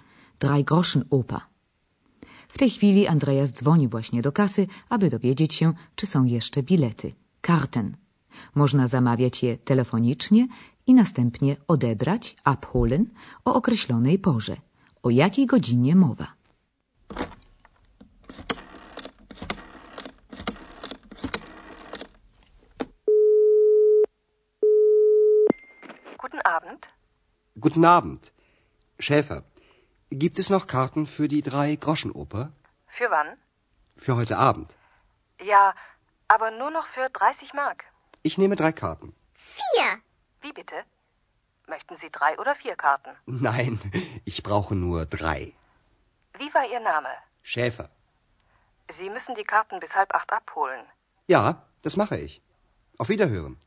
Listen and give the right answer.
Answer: Andreas musi odebrać bilety najpóźniej do wpół do ósmej.